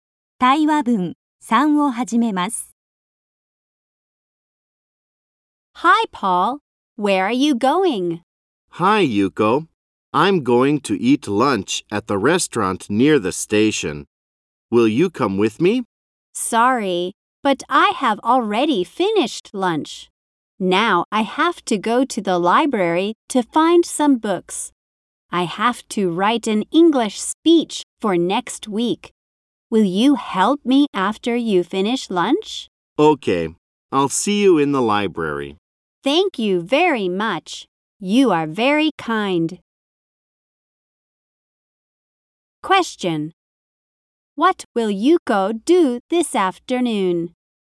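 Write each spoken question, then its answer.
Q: What will Yuko do this afternoon?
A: She will go to the library to find books for her English speech.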